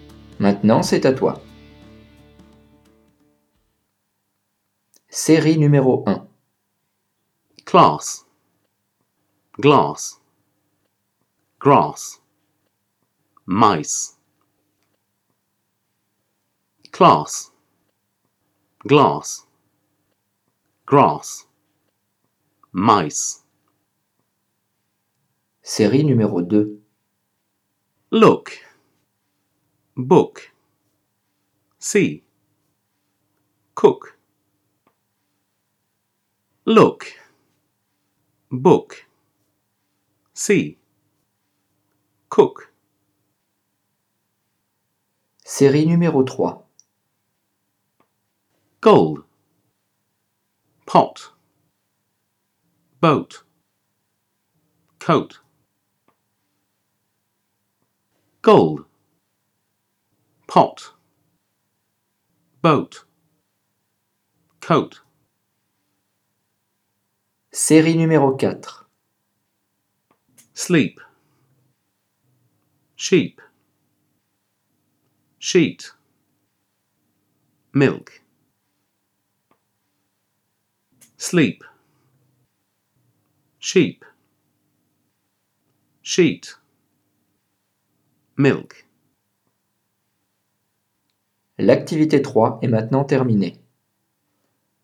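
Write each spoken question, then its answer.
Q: Class, glass, grass, mice.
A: mice

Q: Look, book, see, cook. Look, book, see, cook.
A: see

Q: Gold, pot, boat, coat. Gold, pot, boat, coat.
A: pot

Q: Sleep, sheep, sheet, milk.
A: milk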